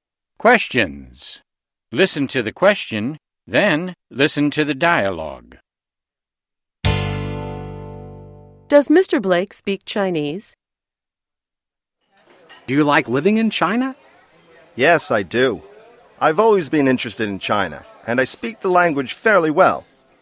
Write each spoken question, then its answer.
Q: Does Mr. Blake speak Chinese?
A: Yes, he does. He speaks the language fairly well.